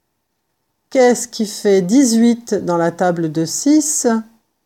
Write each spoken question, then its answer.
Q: Qu'est-ce qui fait 18 dans la table de 6?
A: 18 égale 6 fois 3.